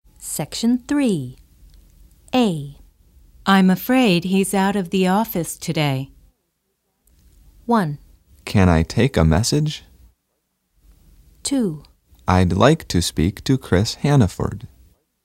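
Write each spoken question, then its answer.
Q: I'm afraid he's out of the office today.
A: 2: I'd like to speak to Chris Hannaford.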